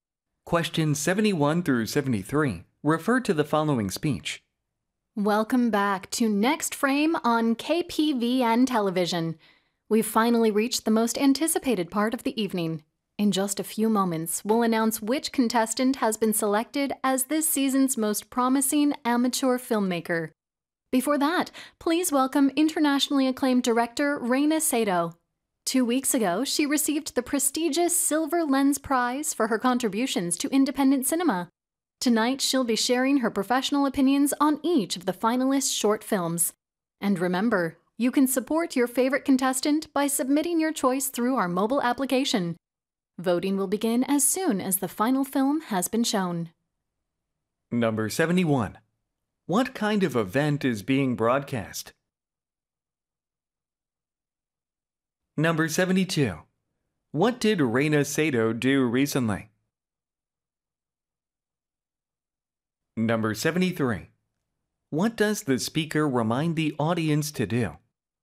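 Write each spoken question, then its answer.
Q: What kind of event is being broadcast?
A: A filmmaking competition show

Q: What did Reina Sato do recently?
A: She received the Silver Lens Prize

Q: What does the speaker remind the audience to do?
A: Vote for a favorite contestant through the mobile application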